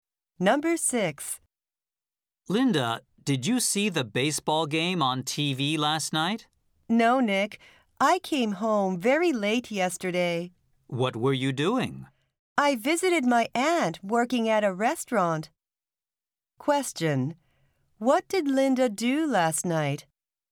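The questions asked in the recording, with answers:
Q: What did Linda do last night?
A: She visited her aunt working at a restaurant.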